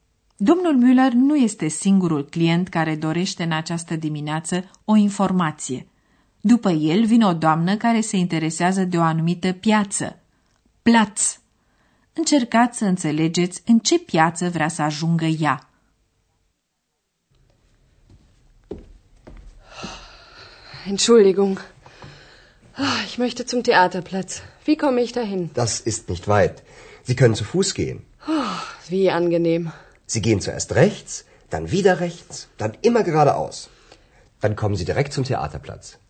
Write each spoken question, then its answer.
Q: Încercați să înțelegeți în ce piață vrea să ajungă ea.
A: Doamna caută așadar piața teatrului.